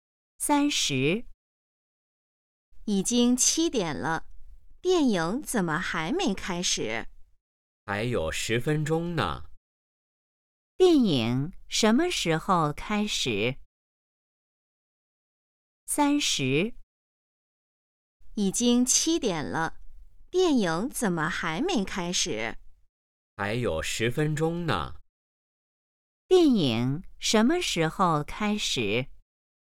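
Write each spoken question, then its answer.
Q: 电影什么时候开始?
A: 7点10分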